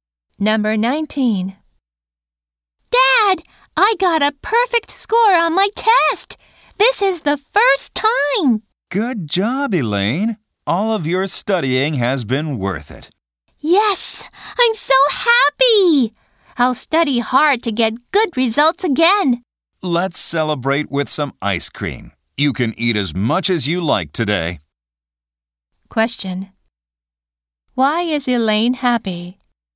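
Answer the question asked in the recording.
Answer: She got a perfect score on her test.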